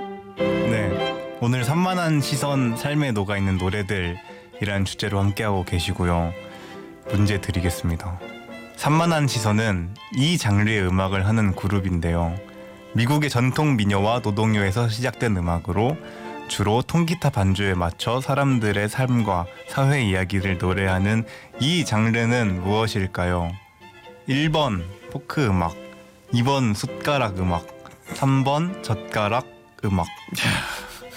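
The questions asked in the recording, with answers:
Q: 미국의 전통 민요와 노동요에서 시작된 음악으로 주로 통기타 반주에 맞춰 사람들의 삶과 사회 이야기를 노래하는 이 장르는 무엇일까요?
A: 1번: 포크 음악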